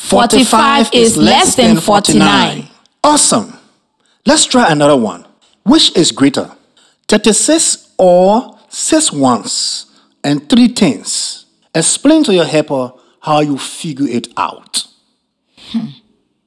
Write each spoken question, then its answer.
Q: Which is greater? 36 or 6 ones and 3 tens?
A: I think they are equal.